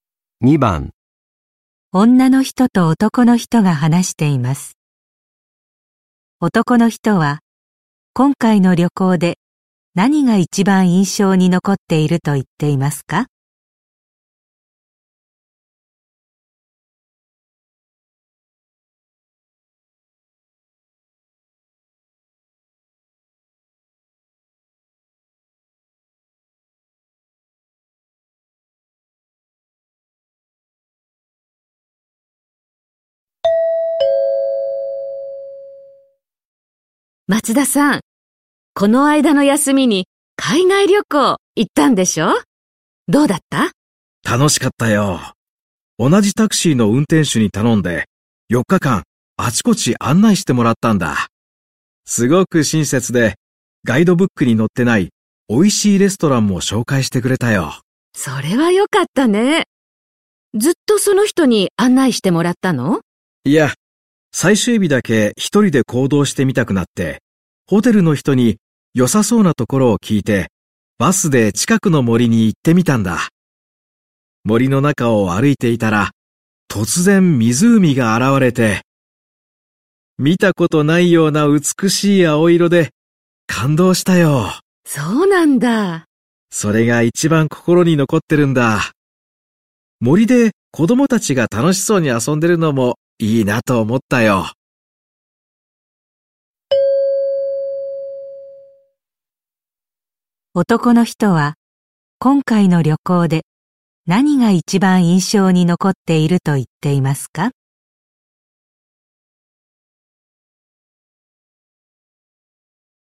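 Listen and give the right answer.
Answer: 森の中で見た美しい青色の湖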